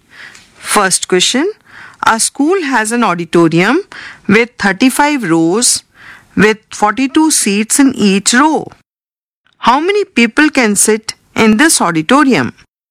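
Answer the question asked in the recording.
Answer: 1470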